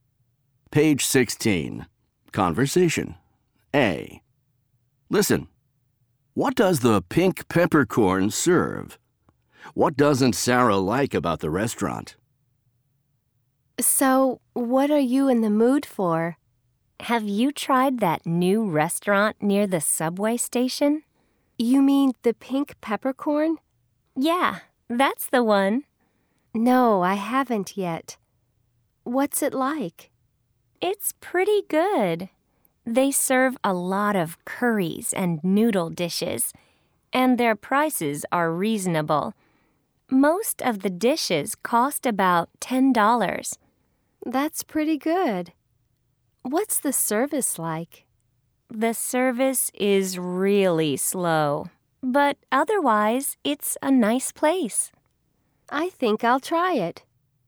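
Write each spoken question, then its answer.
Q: What does the pink peppercorn serve?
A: Curries and noodle dishes

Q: What doesn't Sarah like about the restaurant?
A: The service is really slow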